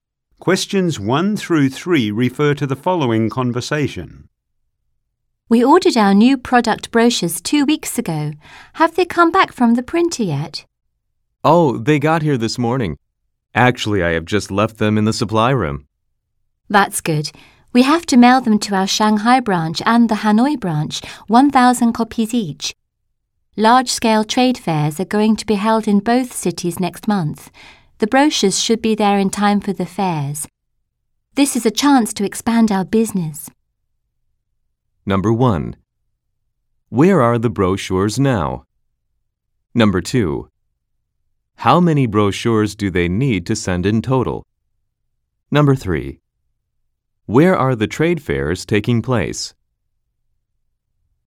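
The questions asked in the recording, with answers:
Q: Where are the brochures now?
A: In the supply room

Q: How many brochures do they need to send in total?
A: 2,000

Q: Where are the trade fairs taking place?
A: In Shanghai and Hanoi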